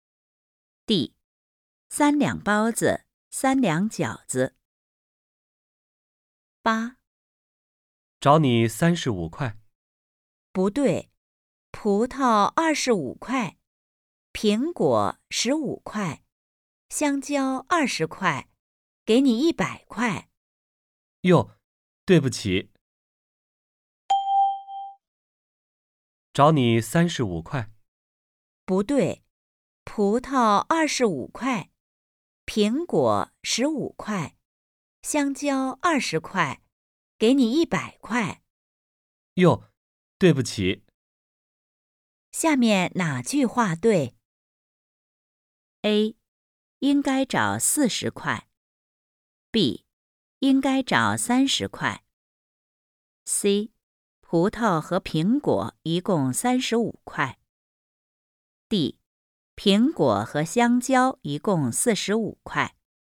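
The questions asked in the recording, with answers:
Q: 下面哪句话对?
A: A: 应该找40块。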